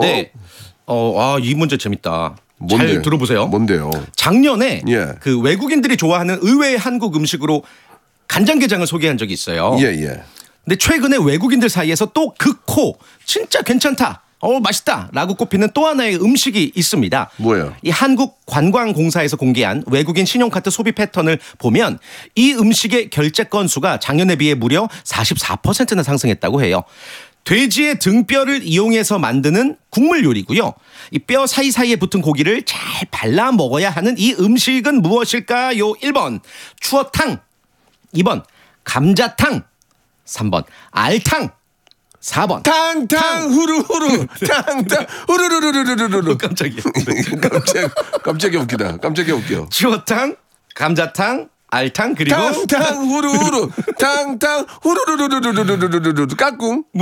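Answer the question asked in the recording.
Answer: 2: 감자탕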